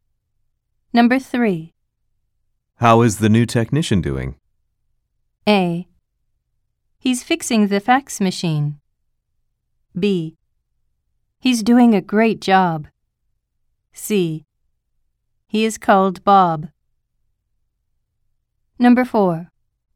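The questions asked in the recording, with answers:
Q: How is the new technician doing?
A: A: He's doing a great job.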